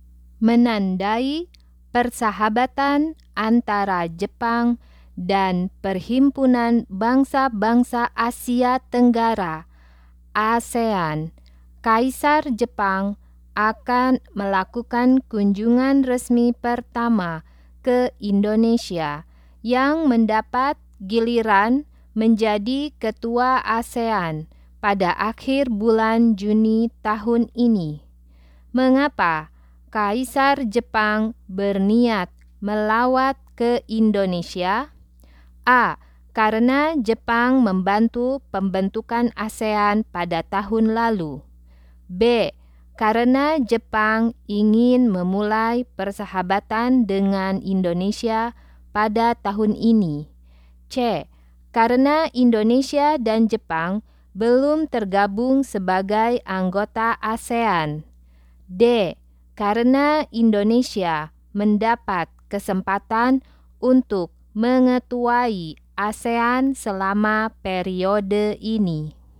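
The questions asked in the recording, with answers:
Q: Mengapa Kaisar Jepang berniat melawat ke Indonesia?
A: D: Karena Indonesia mendapat kesempatan untuk mengetuai ASEAN selama periode ini.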